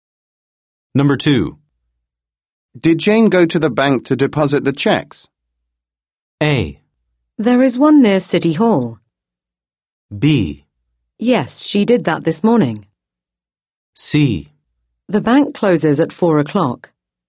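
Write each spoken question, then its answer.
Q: Did Jane go to the bank to deposit the checks?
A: B: Yes, she did that this morning.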